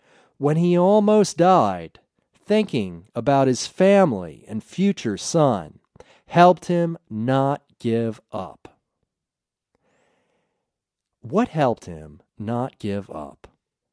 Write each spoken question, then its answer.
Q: What helped him not give up?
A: Thinking about his family helped him not give up.